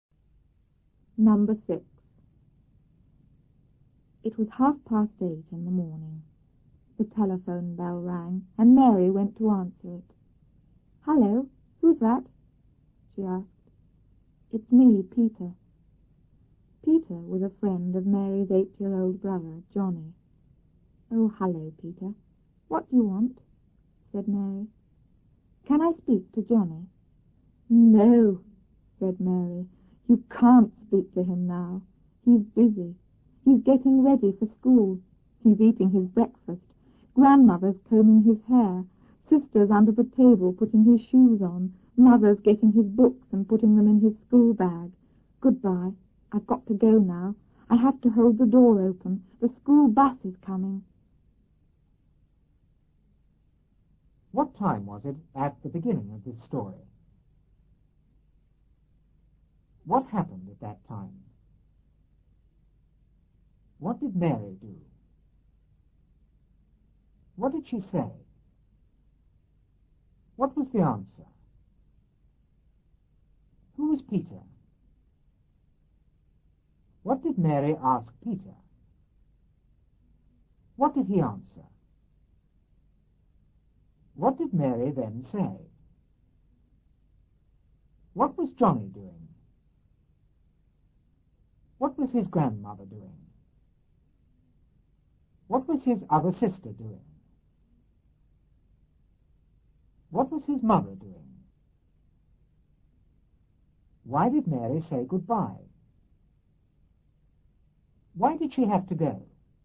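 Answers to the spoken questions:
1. 8:30 in the morning
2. The telephone bell rang
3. She went to answer the telephone
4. Hello, who's that?
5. It's me, Peter.
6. A friend of Mary's 8-year-old brother, Johnny
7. What do you want?
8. Can I speak to Johnny?
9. Getting ready for school, eating his breakfast
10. Combing his hair
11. Putting his shoes on under the table
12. Getting his books and putting them in his school bag
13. She had to hold the door open because the school bus was coming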